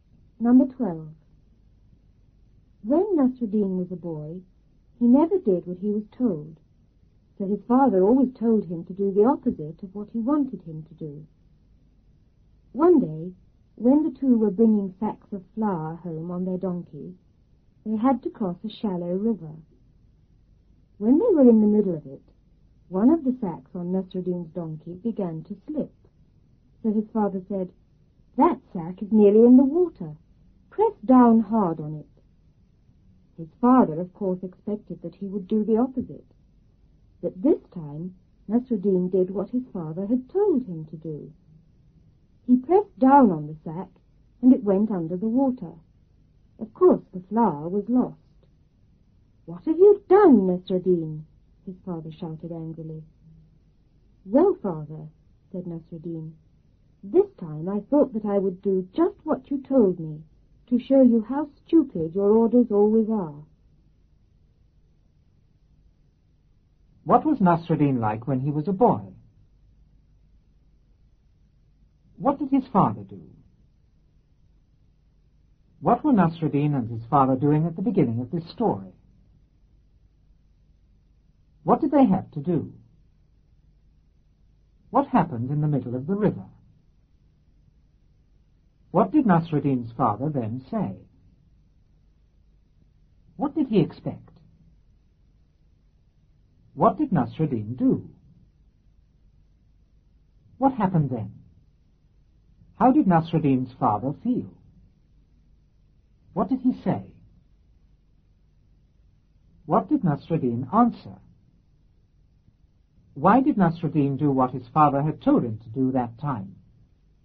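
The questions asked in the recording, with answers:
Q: What was Nasruddin like when he was a boy?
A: He never did what he was told

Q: What did his father do?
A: Told him to do the opposite of what he wanted

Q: What were Nasruddin and his father doing at the beginning of this story?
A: Bringing sacks of flour home on their donkey

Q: What did they have to do?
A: Cross a shallow river

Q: What happened in the middle of the river?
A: A sack on Nasruddin's donkey began to slip

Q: What did Nasruddin's father then say?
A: That sack is nearly in the water. Press down hard on it.

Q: What did he expect?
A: That Nasruddin would do the opposite

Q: What did Nasruddin do?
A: He pressed down on the sack

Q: What happened then?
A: The sack went under the water and the flour was lost

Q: How did Nasruddin's father feel?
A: Angry

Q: What did he say?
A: What have you done, Nasruddin?

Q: What did Nasruddin answer?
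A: This time he did just what he was told, to show how stupid his father's orders always are

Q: Why did Nasruddin do what his father had told him to do that time?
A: To show his father how stupid his orders always are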